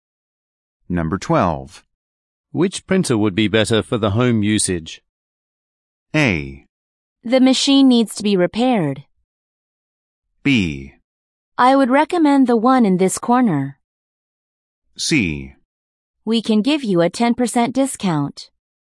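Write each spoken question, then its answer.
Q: Which printer would be better for the home usage?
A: B: I would recommend the one in this corner.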